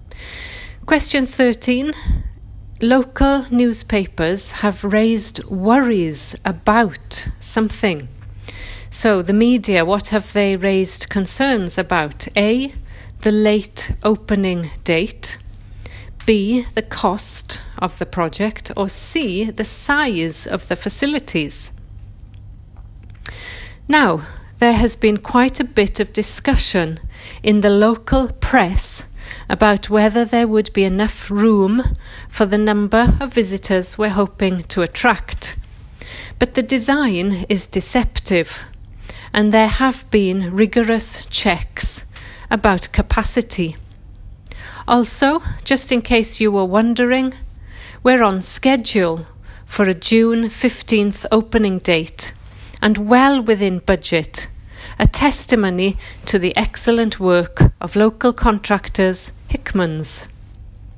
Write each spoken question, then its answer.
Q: Local newspapers have raised worries about something.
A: So that is it, answer C.